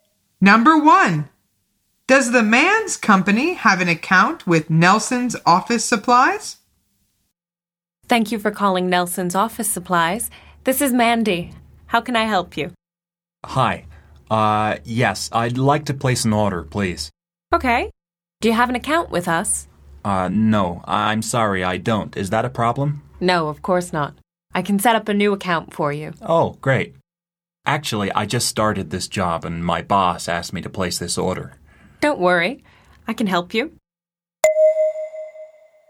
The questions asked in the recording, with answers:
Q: Does the man's company have an account with Nelson's Office Supplies?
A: The answer is no. He says, I'm sorry, I don't.